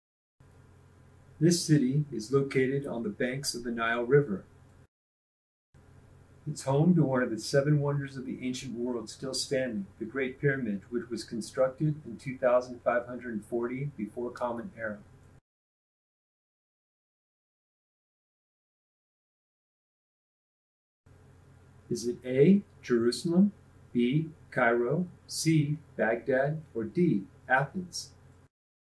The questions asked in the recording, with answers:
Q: Is it A, Jerusalem, B, Cairo, C, Baghdad, or D, Athens?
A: If you wrote Cairo, you're correct.